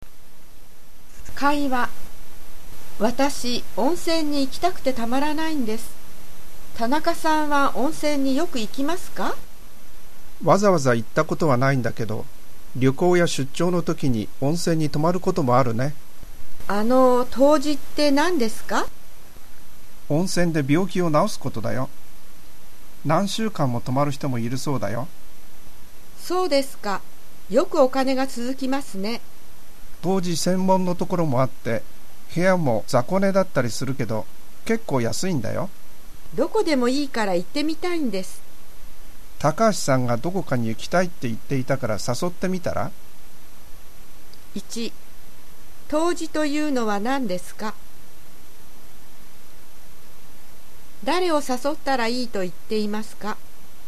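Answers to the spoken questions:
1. 温泉で病気を治すこと
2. 高橋さん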